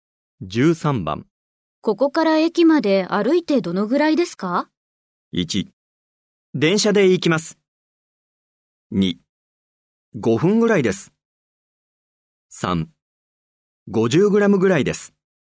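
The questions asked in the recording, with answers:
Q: ここから駅まで歩いてどのぐらいですか?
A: 2: 5分ぐらいです。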